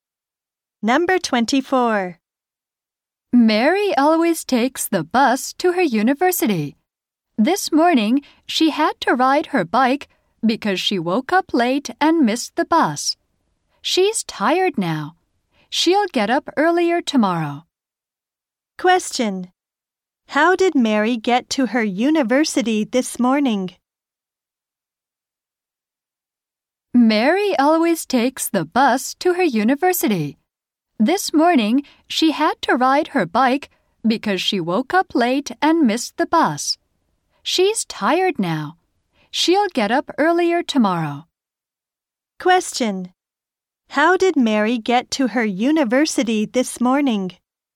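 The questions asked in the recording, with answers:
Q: How did Mary get to her university this morning?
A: She rode her bike.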